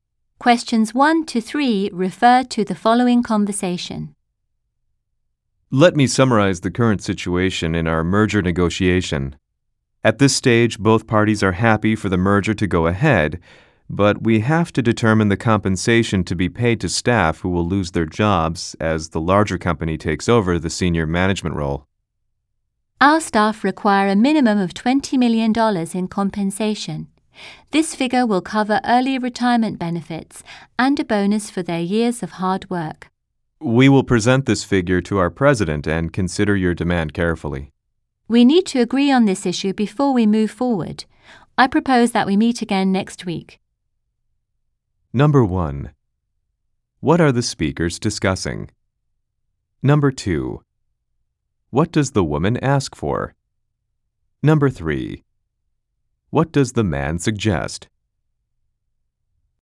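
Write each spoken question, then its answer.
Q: What are the speakers discussing?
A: Staff compensation in a merger negotiation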